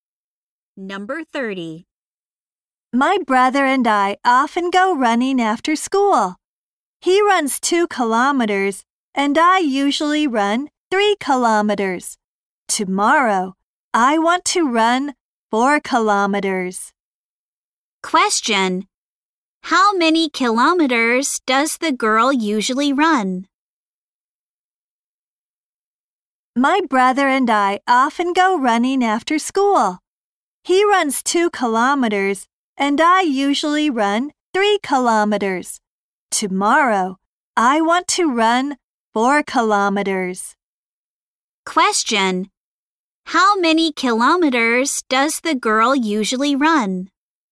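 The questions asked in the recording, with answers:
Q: Question. How many kilometers does the girl usually run?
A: 3 kilometers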